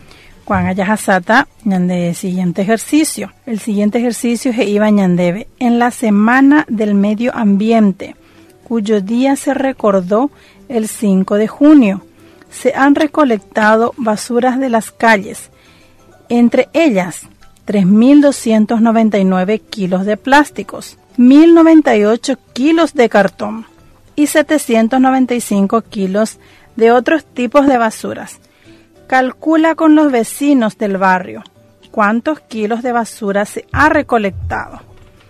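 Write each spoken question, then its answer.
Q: Calcula con los vecinos del barrio cuántos kilos de basura se ha recolectado.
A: 5.192 kilos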